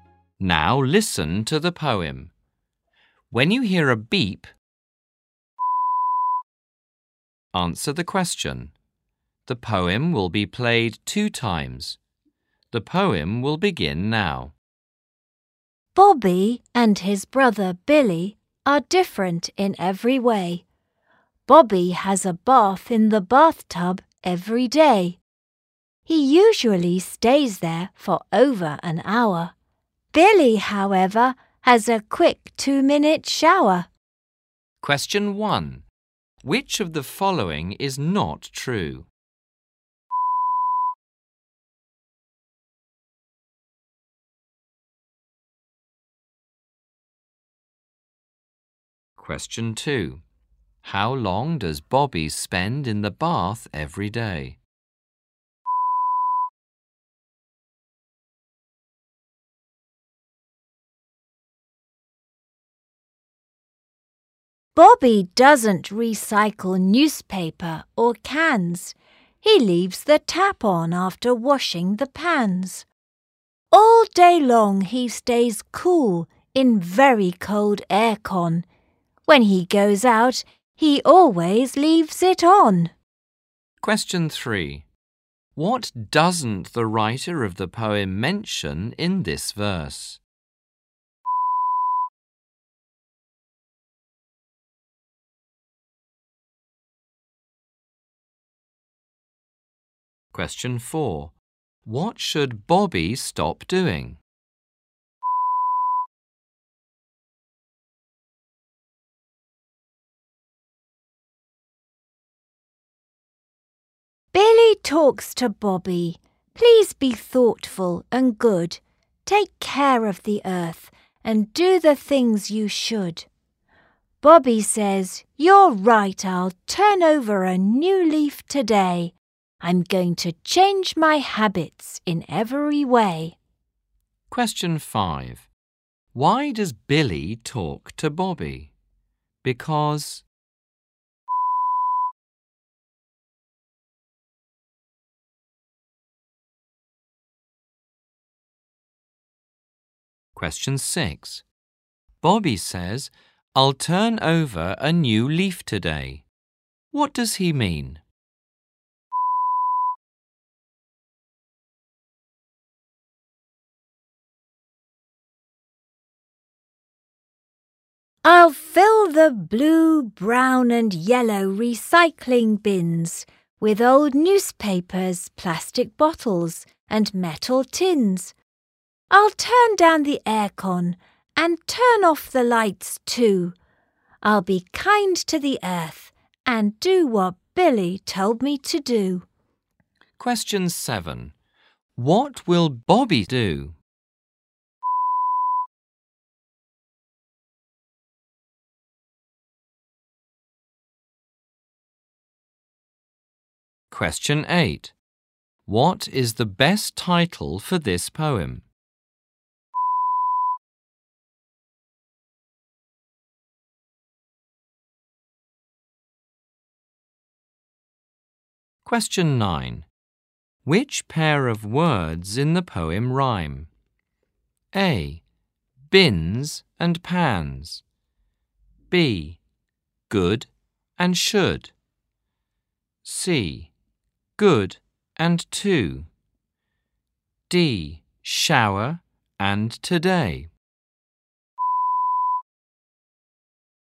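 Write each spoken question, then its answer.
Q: How long does Bobby spend in the bath every day?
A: Over an hour

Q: Which pair of words in the poem rhyme?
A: B: Good and should.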